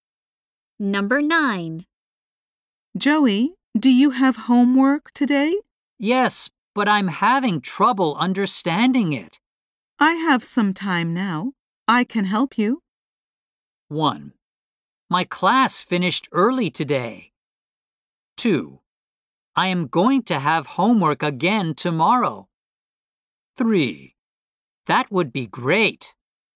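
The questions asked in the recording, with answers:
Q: I have some time now. I can help you.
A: 3: That would be great.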